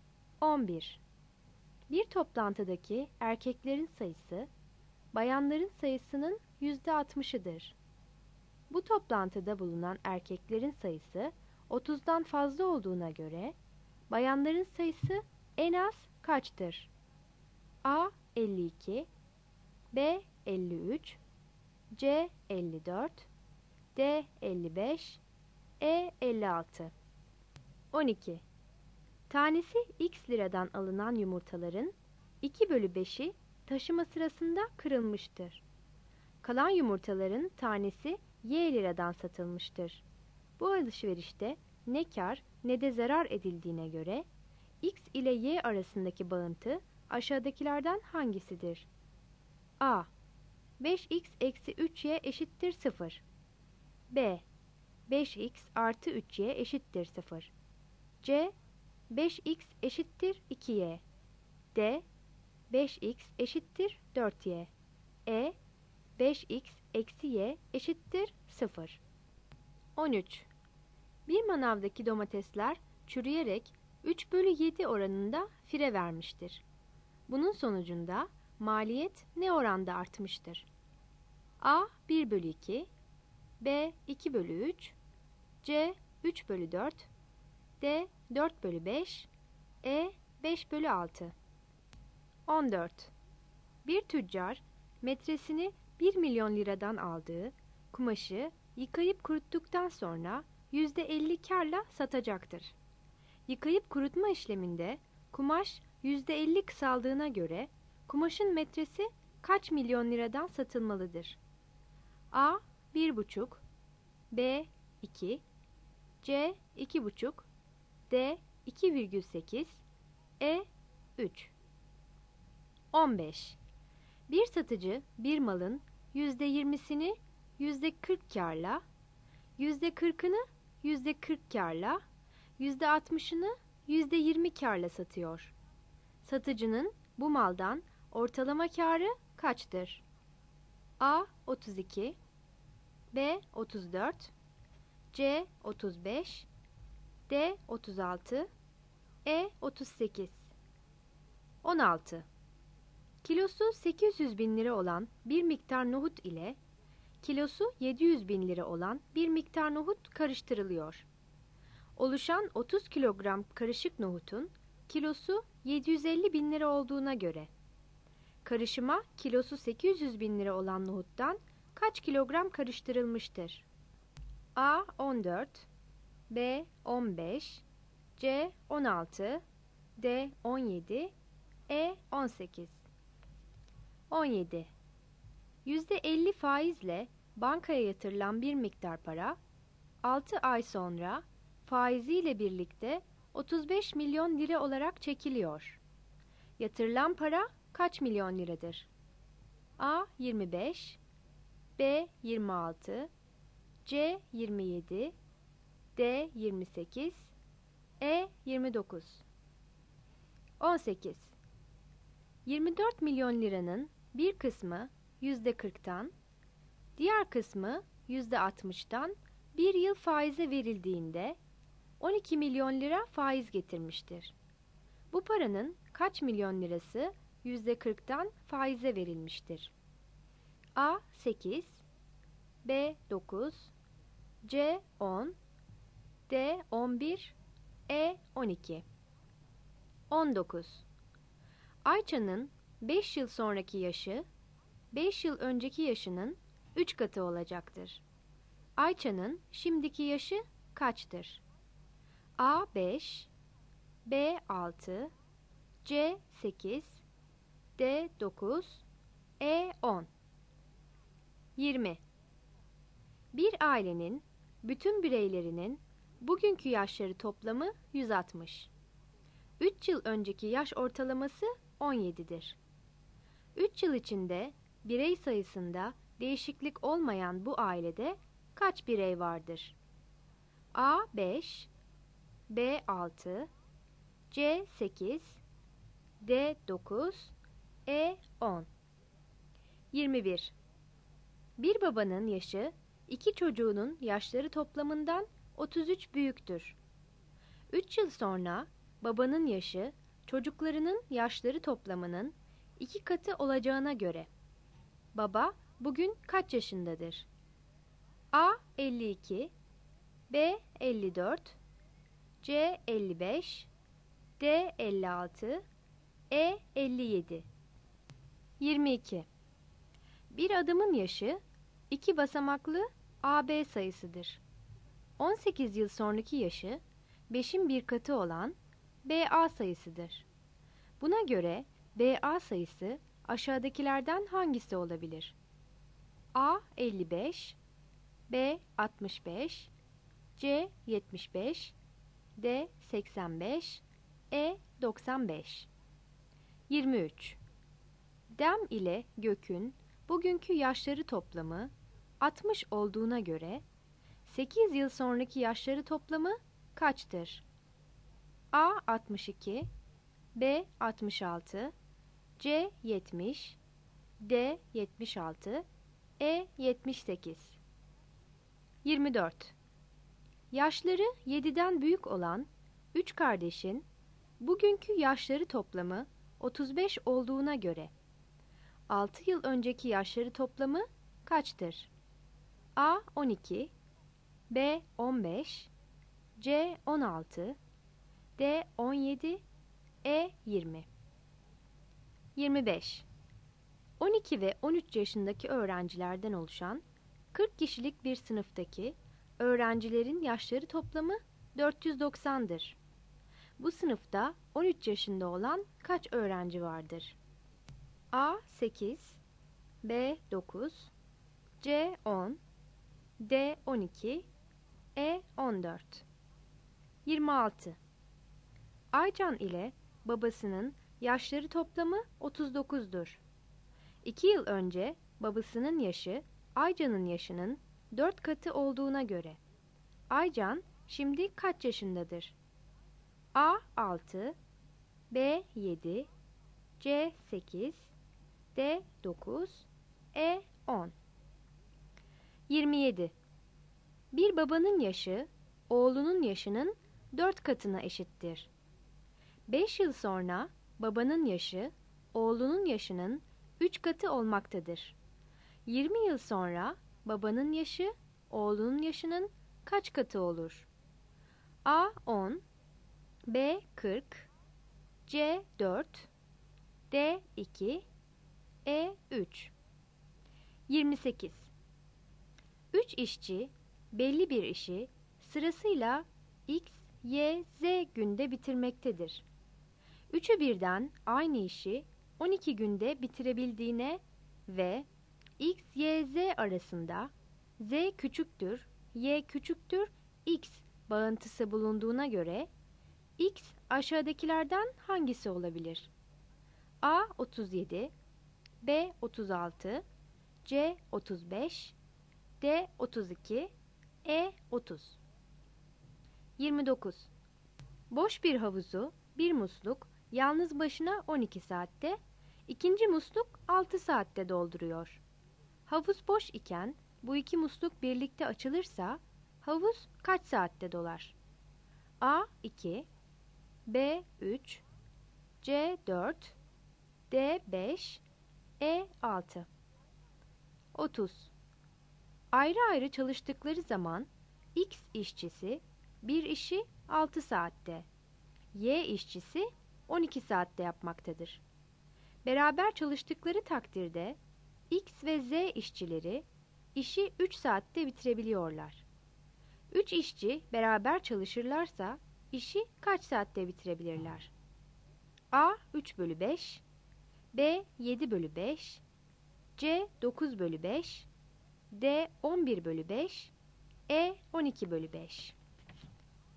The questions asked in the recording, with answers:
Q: Bu toplantıda bulunan erkeklerin sayısı 30'dan fazla olduğuna göre, bayanların sayısı en az kaçtır?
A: Yanıt D'dir.

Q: Bu alışverişte ne kar ne de zarar edildiğine göre X ile Y arasındaki bağıntı aşağıdakilerden hangisidir?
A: Yanıt A'dır.

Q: Bunun sonucunda maliyet ne oranda artmıştır?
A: Yanıt C'dir.

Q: Yıkayıp kurutma işleminde kumaş %50 kısaldığına göre kumaşın metresi kaç milyon liradan satılmalıdır?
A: Yanıt E'dir.

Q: Satıcının bu maldan ortalama kârı kaçtır?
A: Yanıt D'dir.

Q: Oluşan 30 kilogram karışık nohutun kilosu 750 bin lira olduğuna göre karışıma kilosu 800 bin lira olan nohuttan kaç kilogram karıştırılmıştır?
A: Yanıt B'dir.

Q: Yatırılan para kaç milyon liradır?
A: Yanıt D'dir.

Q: Bu paranın kaç milyon lirası %40'tan faize verilmiştir?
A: Yanıt E'dir.

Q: Ayça'nın şimdiki yaşı kaçtır?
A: Yanıt E'dir.

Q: 3 yıl içinde birey sayısında değişiklik olmayan bu ailede kaç birey vardır?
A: Yanıt C'dir.

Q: 3 yıl sonra babanın yaşı çocuklarının yaşları toplamının 2 katı olacağına göre baba bugün kaç yaşındadır?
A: Yanıt E'dir.

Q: Buna göre BA sayısı aşağıdakilerden hangisi olabilir?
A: Yanıt C'dir.

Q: Dem ile Gök'ün bugünkü yaşları toplamı 60 olduğuna göre 8 yıl sonraki yaşları toplamı kaçtır?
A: Yanıt D'dir.

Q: Yaşları 7'den büyük olan 3 kardeşin bugünkü yaşları toplamı 35 olduğuna göre 6 yıl önceki yaşları toplamı kaçtır?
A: Yanıt D'dir.

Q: Bu sınıfta 13 yaşında olan kaç öğrenci vardır?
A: Yanıt C'dir.

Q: 2 yıl önce babasının yaşı Aycan'ın yaşının 4 katı olduğuna göre Aycan şimdi kaç yaşındadır?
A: Yanıt D'dir.

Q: 20 yıl sonra babanın yaşı oğlunun yaşının kaç katı olur?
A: Yanıt D'dir.

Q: 3'ü birden aynı işi 12 günde bitirebildiğine ve X, Y, Z arasında Z küçüktür, Y küçüktür, X bağıntısı bulunduğuna göre X aşağıdakilerden hangisi olabilir?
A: Yanıt A'dır.

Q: Havuz boş iken bu iki musluk birlikte açılırsa havuz kaç saatte dolar?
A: Yanıt C'dir.

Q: 3 işçi beraber çalışırlarsa işi kaç saatte bitirebilirler?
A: Yanıt E'dir.